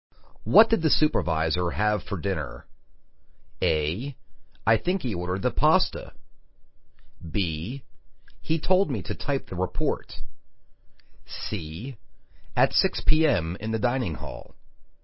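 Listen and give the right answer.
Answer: A: I think he ordered the pasta.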